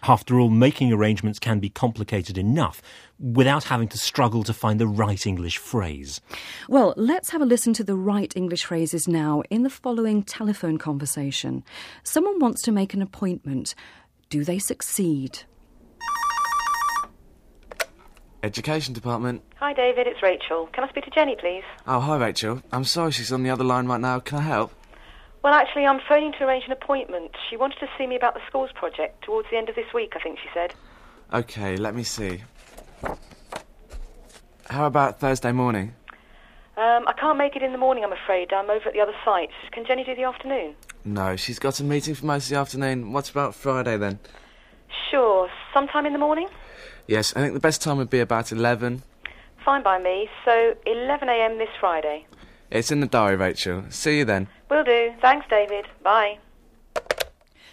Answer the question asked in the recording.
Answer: Well, the appointment's finally made, but only after a lot of discussion.